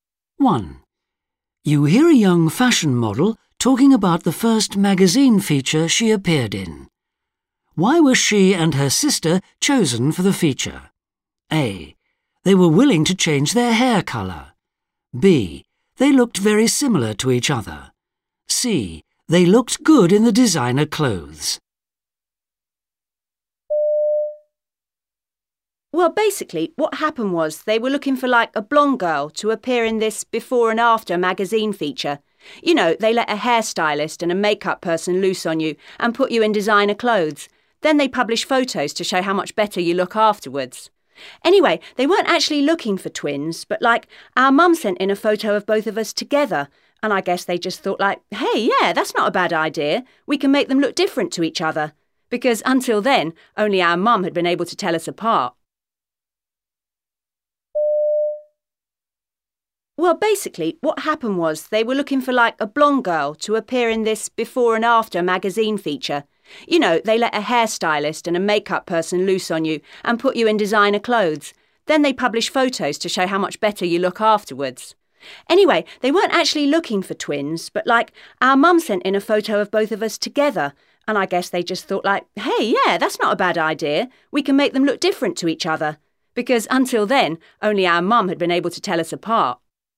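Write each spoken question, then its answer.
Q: Why were she and her sister chosen for the feature?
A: B: They looked very similar to each other.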